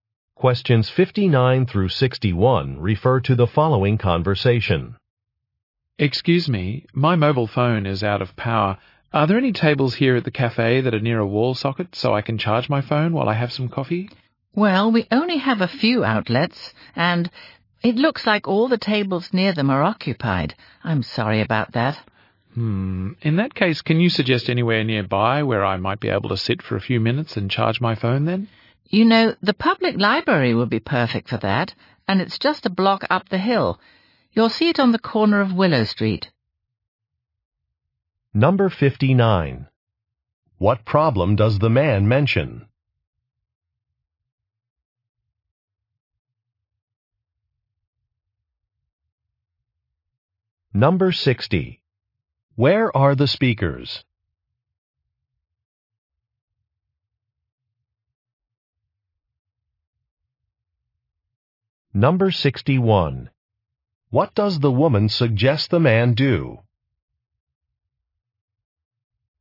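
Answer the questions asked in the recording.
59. His phone is out of power
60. At a cafe
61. Go to the public library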